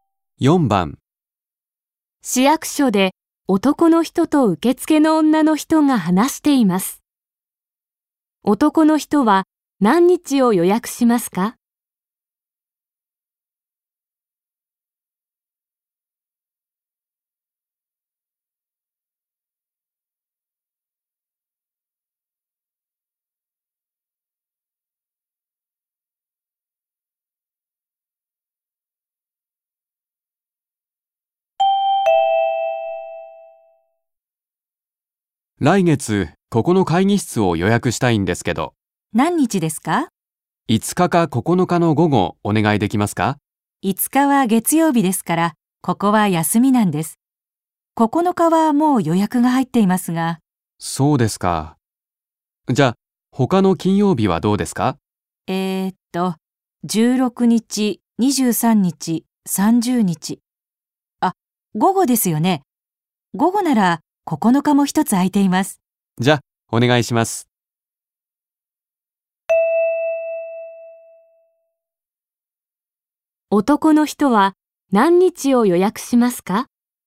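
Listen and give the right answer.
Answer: 9日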